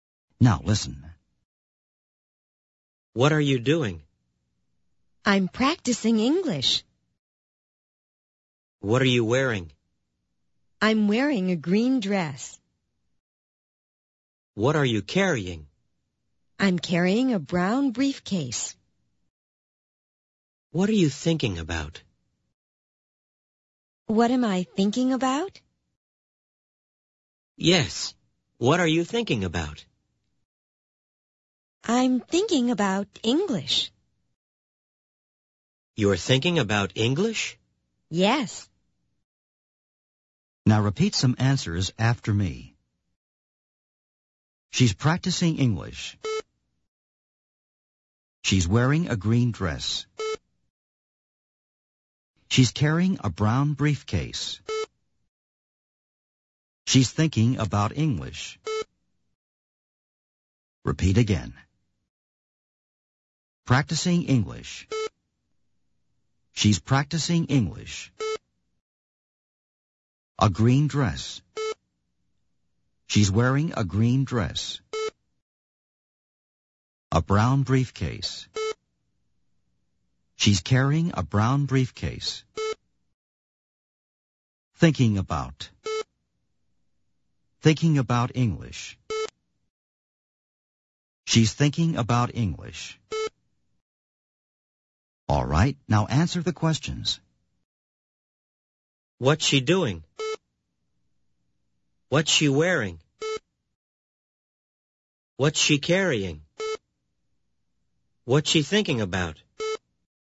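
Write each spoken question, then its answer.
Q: What's she doing?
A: She's practicing English.

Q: What's she wearing?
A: She's wearing a green dress.

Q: What's she carrying?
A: She's carrying a brown briefcase.

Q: What's she thinking about?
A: She's thinking about English.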